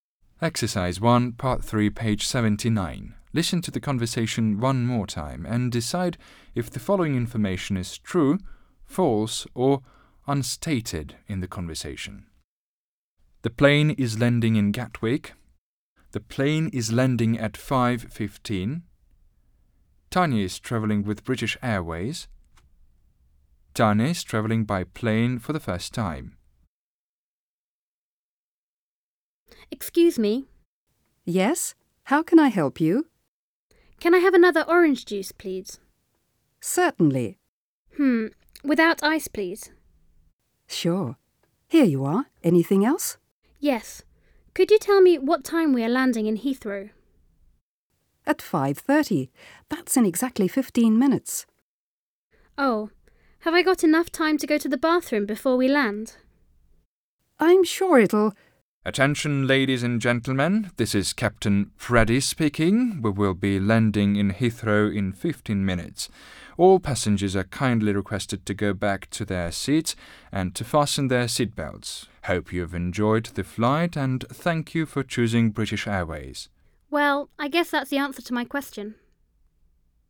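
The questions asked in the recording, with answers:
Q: The plane is landing in Gatwick.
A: False

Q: The plane is landing at 5:15.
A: False

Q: Tanya is travelling with British Airways.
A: True

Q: Tanya is travelling by plane for the first time.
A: Unstated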